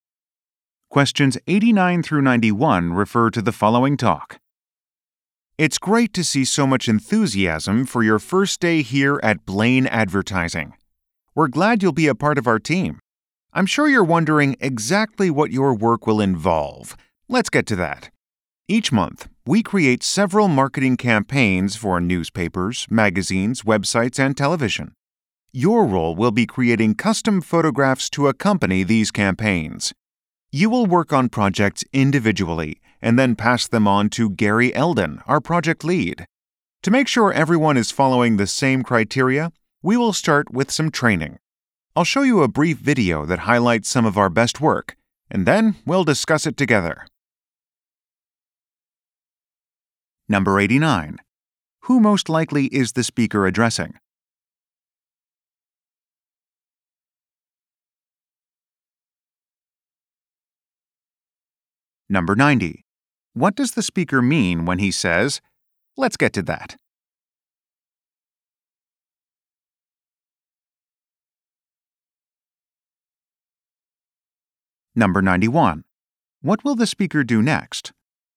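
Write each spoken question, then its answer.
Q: Who most likely is the speaker addressing?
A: New employees who will create photographs (photographers)

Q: What will the speaker do next?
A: Show a brief video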